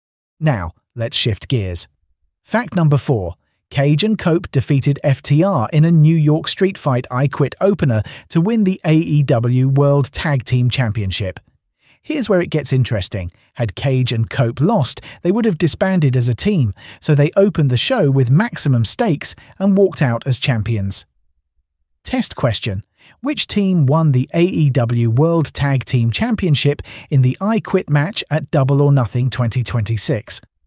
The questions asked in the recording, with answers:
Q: Which team won the AEW World Tag Team Championship in the I Quit match at Double or Nothing 2026?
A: Cage and Cope.